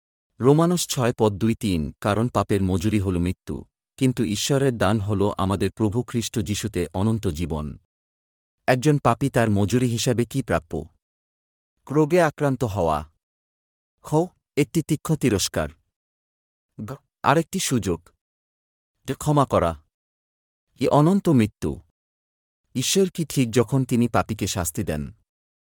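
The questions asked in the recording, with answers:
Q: একজন পাপী তার মজুরি হিসাবে কি প্রাপ্য?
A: এ: অনন্ত মৃত্যু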